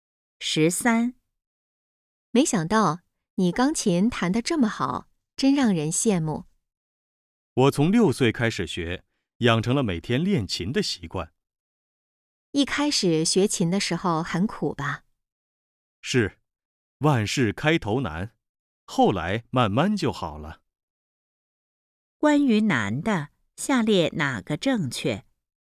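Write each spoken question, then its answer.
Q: 关于难的,下列哪个正确?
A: 他从6岁开始学钢琴,每天练琴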